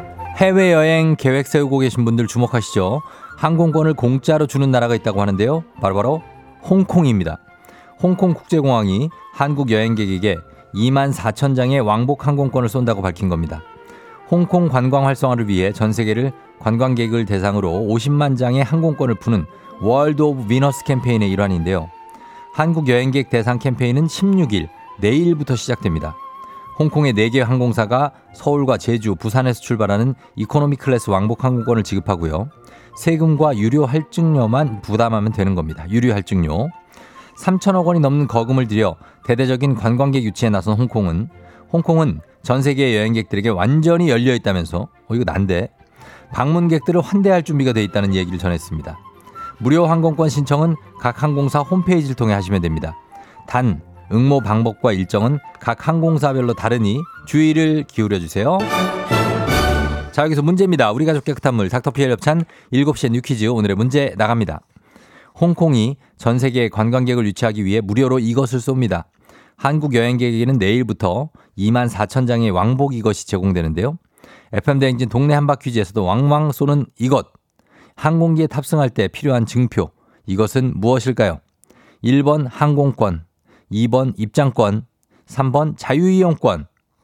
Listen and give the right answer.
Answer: 정답 1번 항공권입니다.